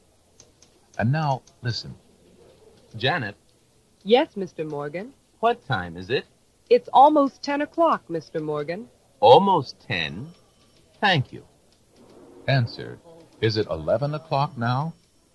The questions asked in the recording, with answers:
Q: Answer. Is it 11 o'clock now?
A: No, it's not.